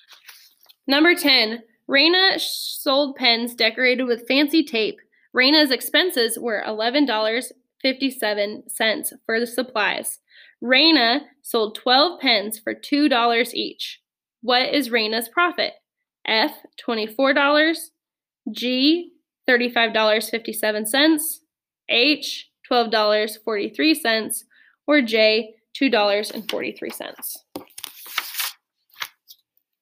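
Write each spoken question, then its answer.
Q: What is Raina's profit?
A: H: $12.43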